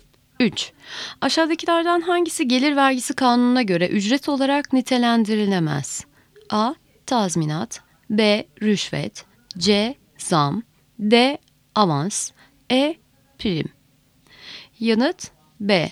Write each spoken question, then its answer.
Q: Aşağıdakilerden hangisi gelir vergisi kanununa göre ücret olarak nitelendirilemez?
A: Yanıt B. Rüşvet.